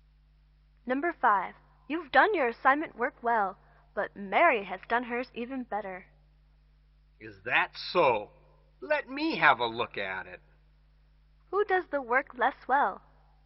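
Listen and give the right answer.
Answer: The person being spoken to (not Mary)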